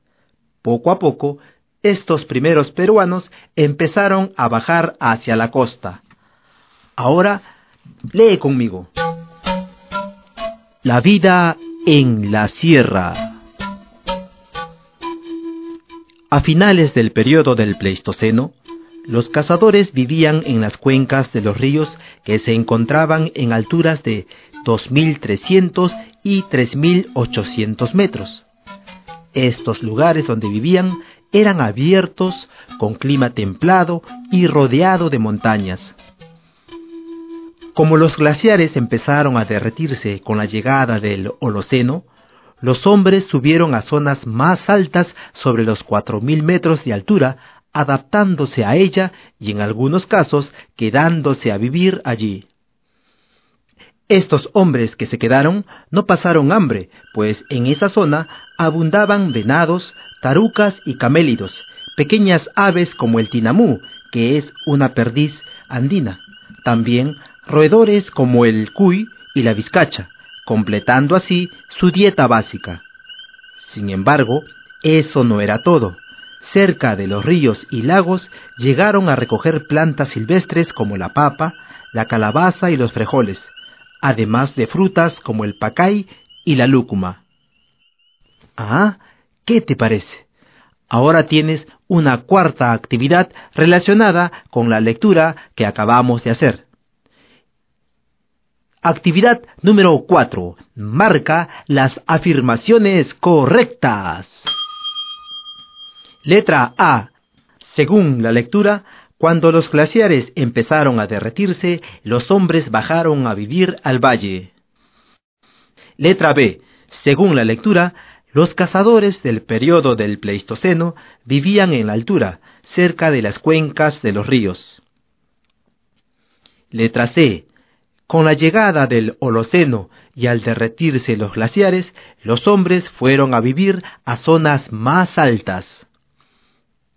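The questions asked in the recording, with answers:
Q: Letra A. Según la lectura, cuando los glaciares empezaron a derretirse, los hombres bajaron a vivir al valle.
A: Incorrecta

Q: Letra C. Con la llegada del Holoceno y al derretirse los glaciares, los hombres fueron a vivir a zonas más altas.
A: Correcta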